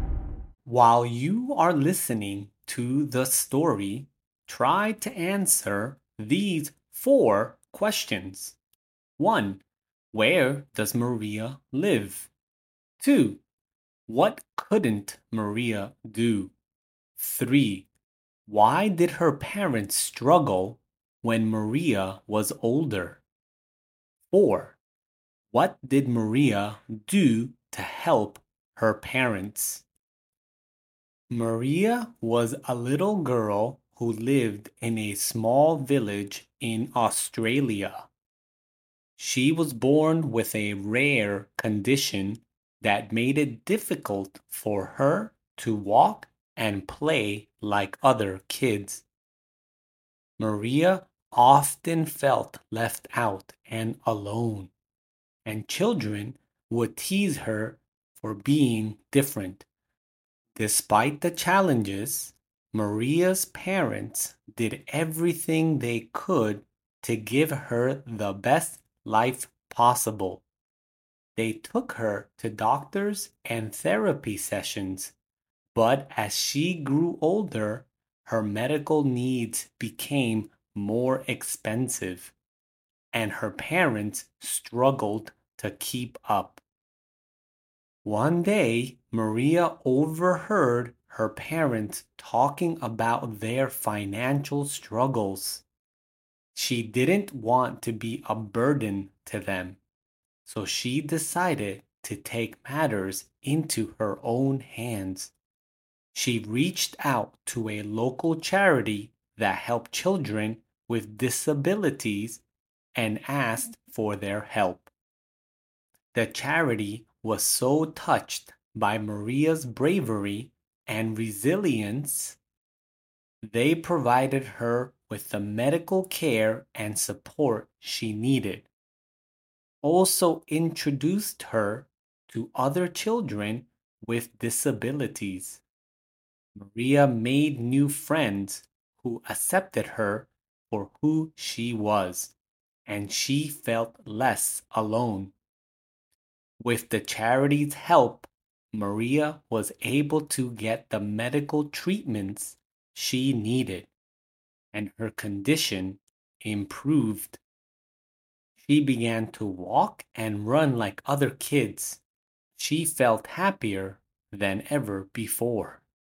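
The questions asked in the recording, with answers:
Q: Where does Maria live?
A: In a small village in Australia

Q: What couldn't Maria do?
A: Walk and play like other kids

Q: Why did her parents struggle when Maria was older?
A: Her medical needs became more expensive

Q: What did Maria do to help her parents?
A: She asked a local charity for help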